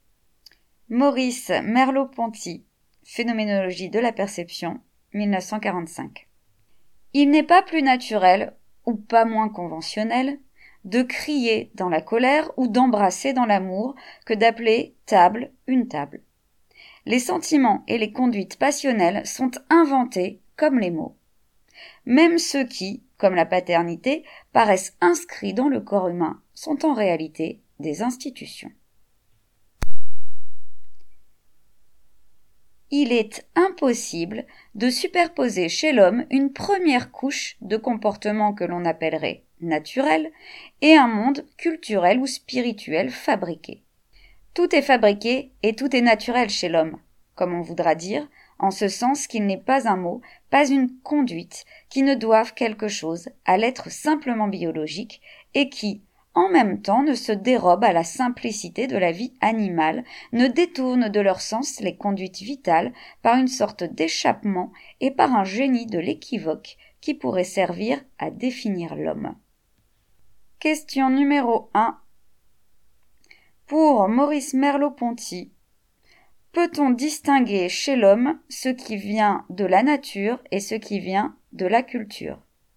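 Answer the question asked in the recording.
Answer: Non : tout est fabriqué et tout est naturel chez l'homme.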